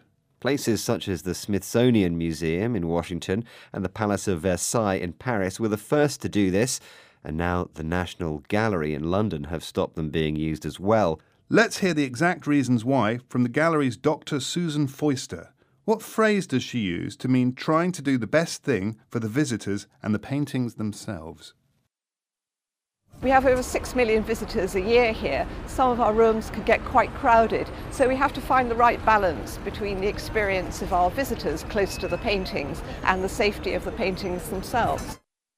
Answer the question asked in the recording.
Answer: It's what Dr. Foister called the right balance.